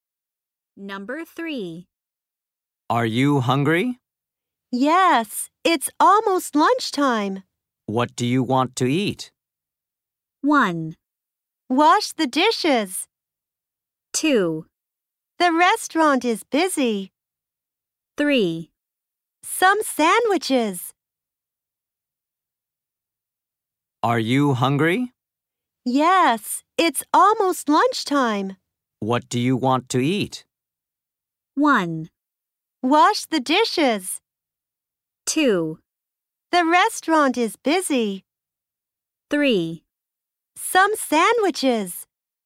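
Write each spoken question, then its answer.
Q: What do you want to eat?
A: 3: Some sandwiches.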